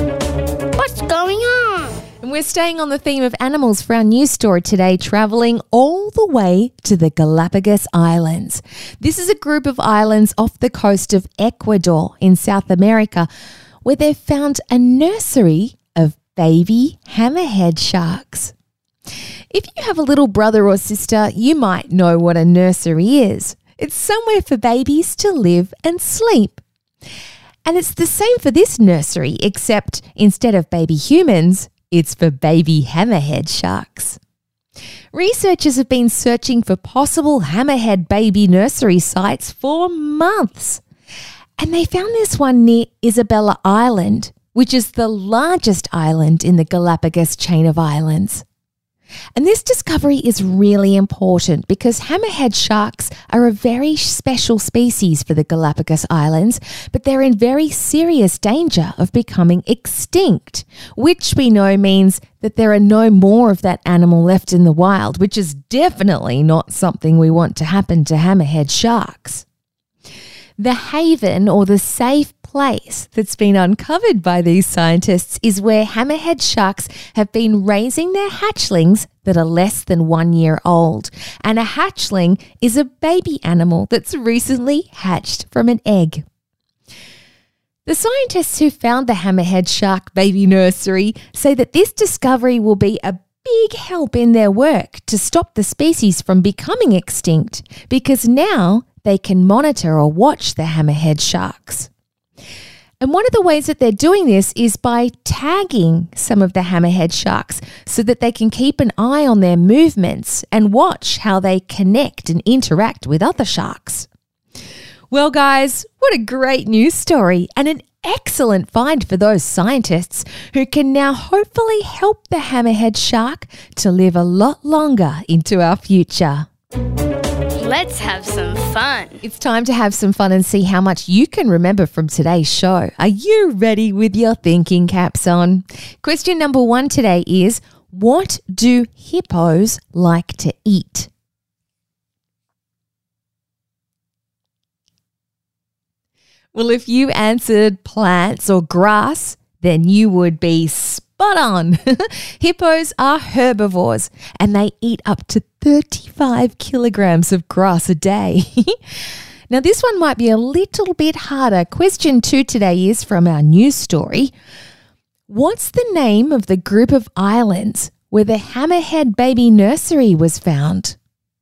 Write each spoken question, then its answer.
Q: What's the name of the group of islands where the hammerhead baby nursery was found?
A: Well done to anybody who said the Galapagos Islands or even Isabella Island.